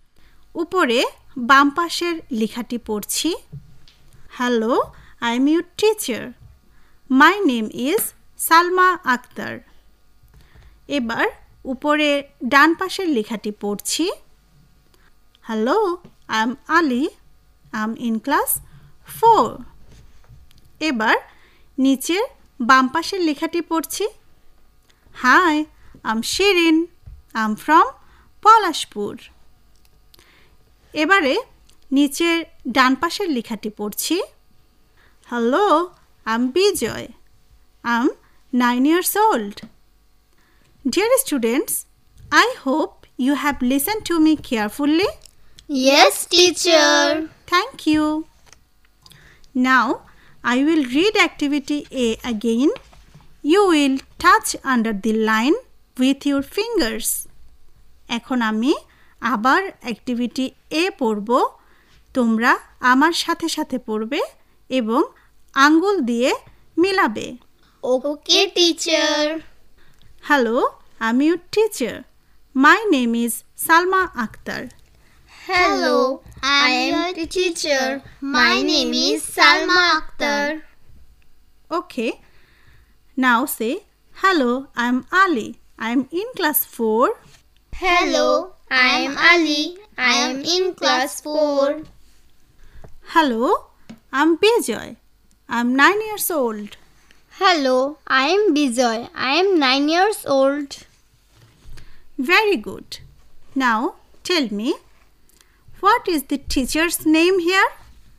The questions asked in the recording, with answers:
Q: Now, tell me, what is the teacher's name here?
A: Salma Akhtar.